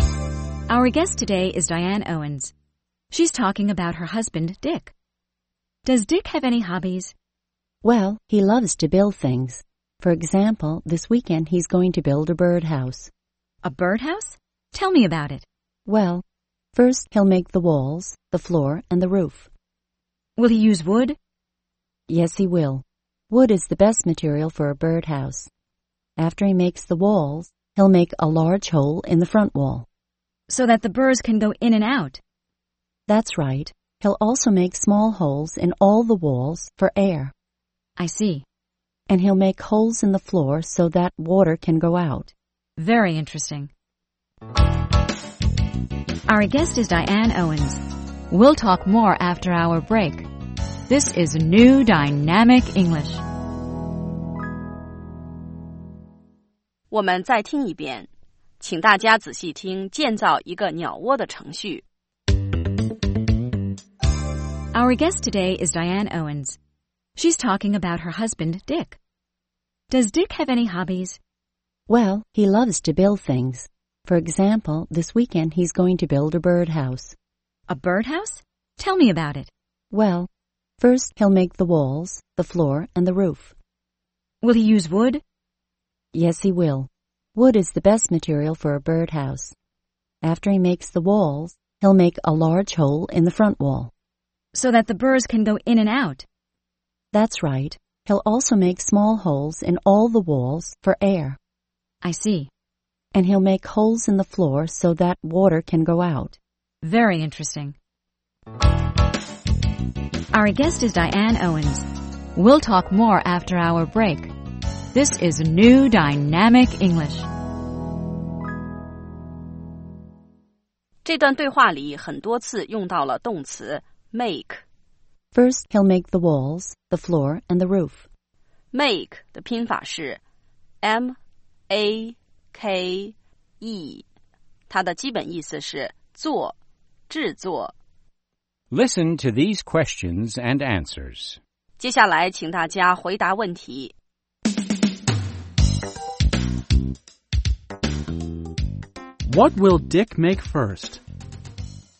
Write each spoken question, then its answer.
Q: What will Dick make first?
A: First,He'll make the walls, the floor, and the roof.